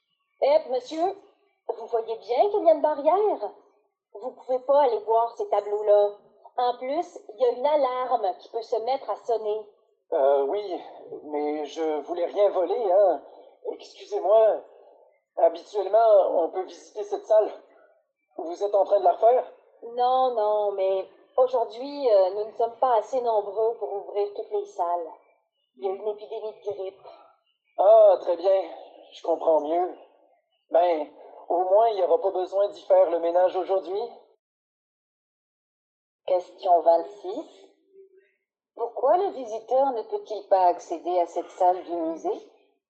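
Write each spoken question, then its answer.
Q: Pourquoi le visiteur ne peut-il pas accéder à cette salle du musée?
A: Parce qu'il manque du personnel (épidémie de grippe), pas assez nombreux pour ouvrir toutes les salles.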